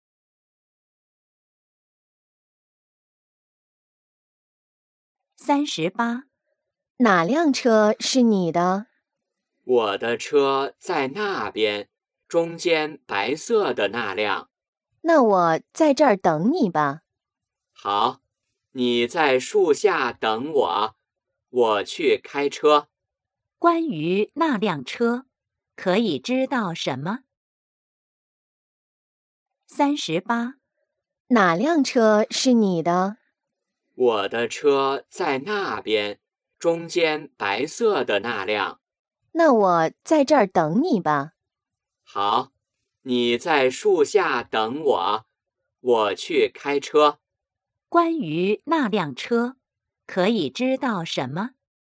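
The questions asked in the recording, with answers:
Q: 关于那辆车,可以知道什么?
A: 是白色的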